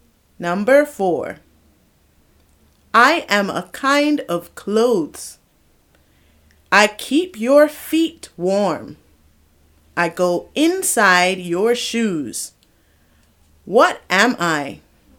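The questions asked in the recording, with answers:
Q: What am I?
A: socks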